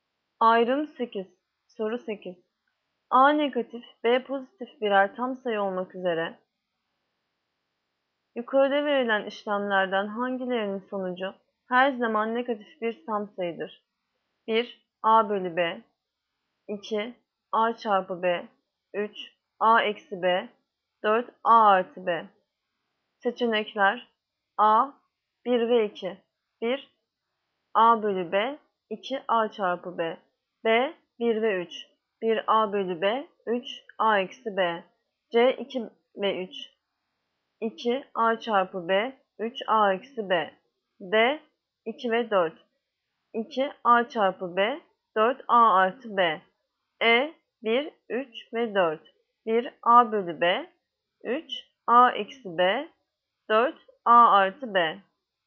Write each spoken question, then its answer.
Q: Yukarıda verilen işlemlerden hangilerinin sonucu her zaman negatif bir tam sayıdır?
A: Yanıt Ceyhan 2 ve 3. A çarpı B ve A eksi B.